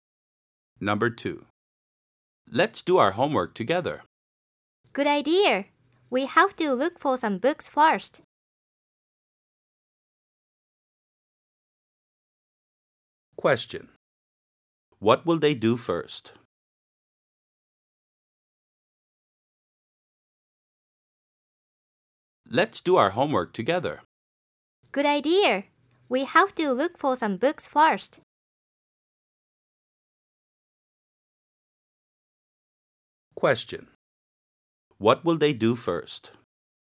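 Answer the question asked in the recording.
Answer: Look for some books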